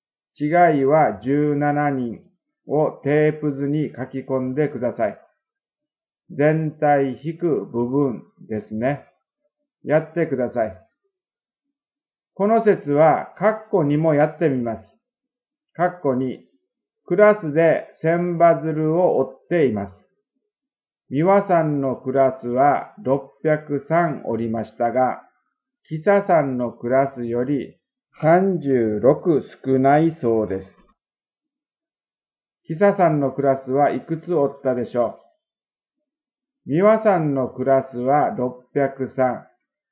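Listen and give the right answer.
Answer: 639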